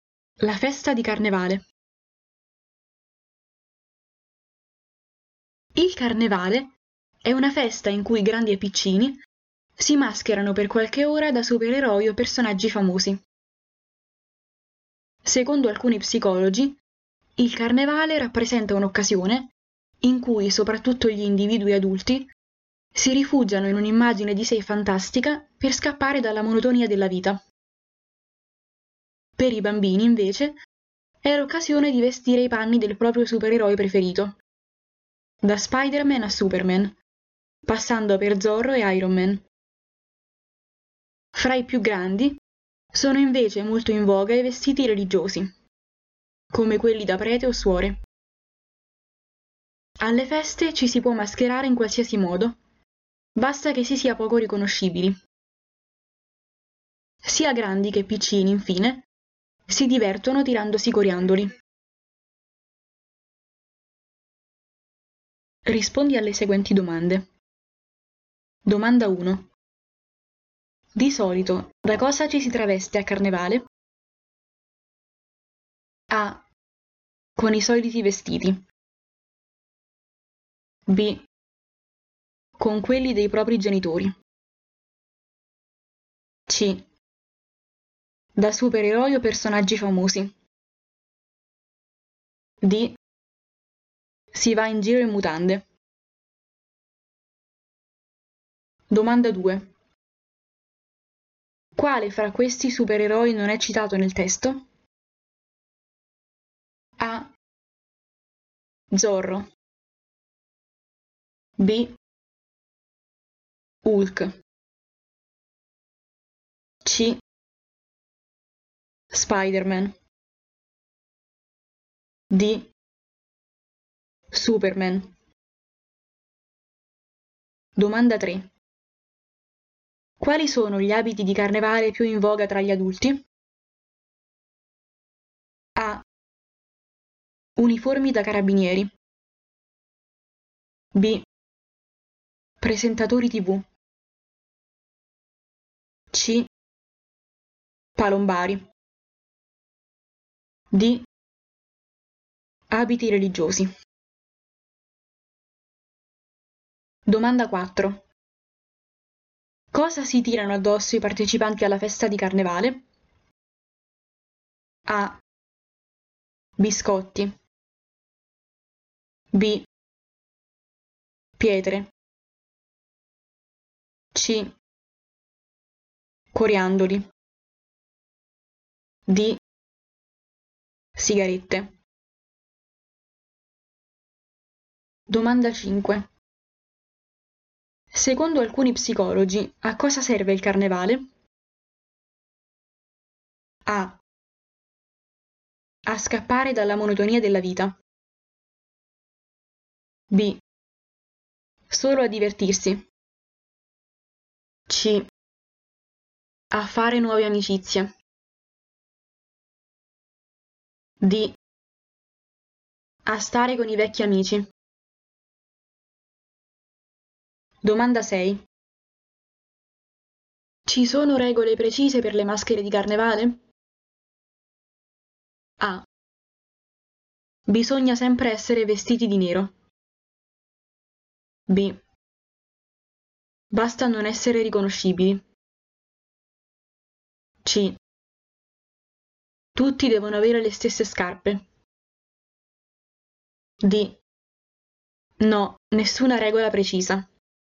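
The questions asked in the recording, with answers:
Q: Di solito, da cosa ci si traveste a Carnevale?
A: C: Da supereroi o personaggi famosi.

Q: Quale fra questi supereroi non è citato nel testo?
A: B: Hulk.

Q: Quali sono gli abiti di carnevale più in voga tra gli adulti?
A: D: Abiti religiosi.

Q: Cosa si tirano addosso i partecipanti alla festa di Carnevale?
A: C: Coriandoli.

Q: Secondo alcuni psicologi, a cosa serve il carnevale?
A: A: A scappare dalla monotonia della vita.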